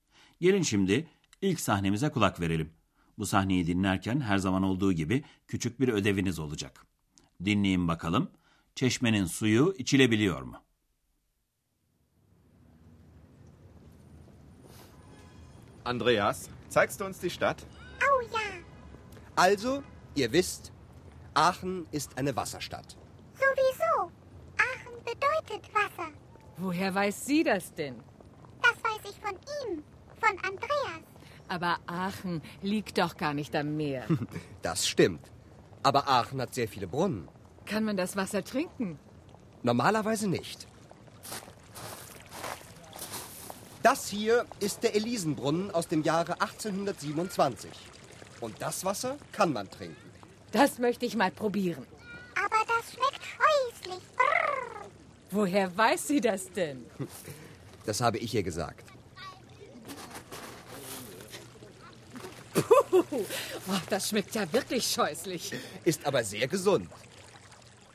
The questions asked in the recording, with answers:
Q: Çeşmenin suyu içilebiliyor mu?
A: Normal olarak bu tür çeşmelerin suyu içilmez sevgili dinleyenler. Ama ünlü Elize çeşmesinin suyu içilebiliyor.